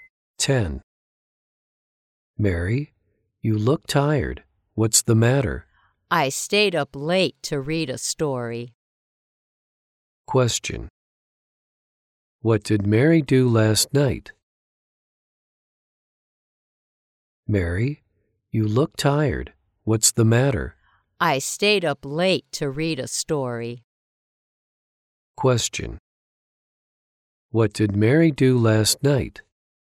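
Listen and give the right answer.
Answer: She stayed up late to read a story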